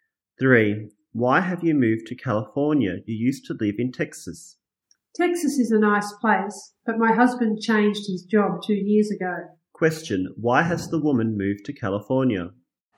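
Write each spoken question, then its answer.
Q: Why has the woman moved to California?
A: Her husband changed his job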